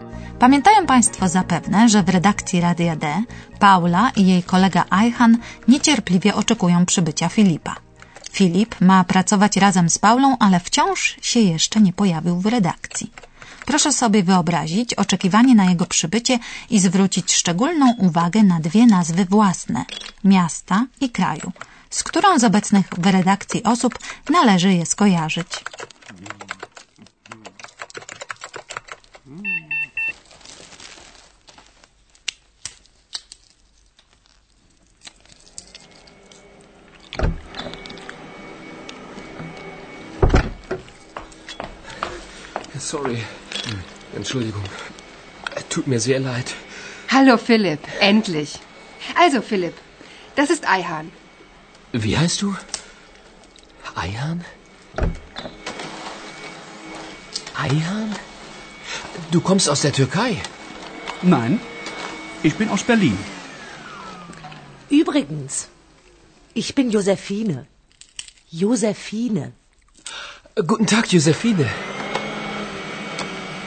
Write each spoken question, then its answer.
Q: Proszę sobie wyobrazić oczekiwanie na jego przybycie i zwrócić szczególną uwagę na dwie nazwy własne – miasta i kraju, z którą z obecnych w redakcji osób należy je skojarzyć.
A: Berlin, Berlin i Turcja, Türkei.